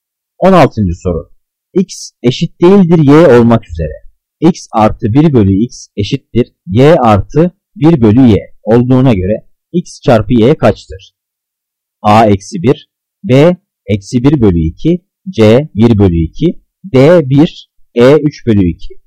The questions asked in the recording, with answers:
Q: X artı 1 bölü x eşittir y artı 1 bölü y olduğuna göre x çarpı y kaçtır?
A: Cevap D 1.